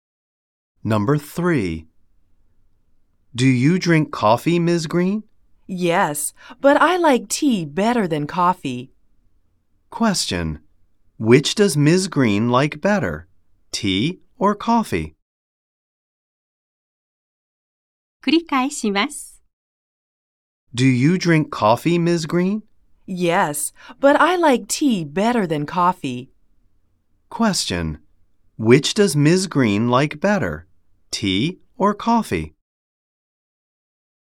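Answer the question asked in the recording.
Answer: Tea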